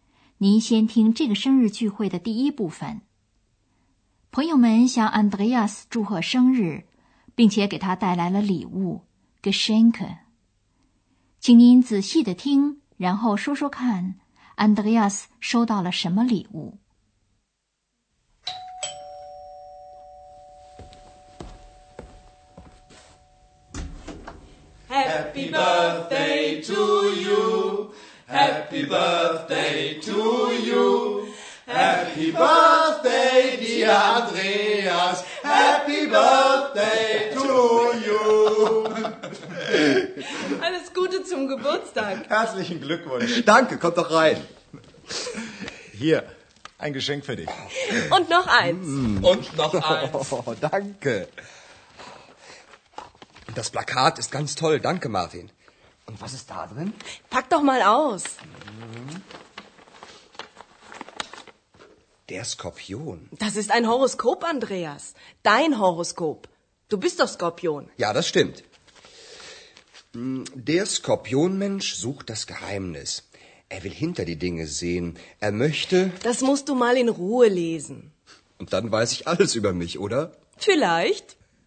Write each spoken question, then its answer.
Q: 请您仔细地听,然后说说看 Andreas 收到了什么礼物。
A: Andreas 打开了两件礼物的包装纸,原来是一张招贴画和一本星象书。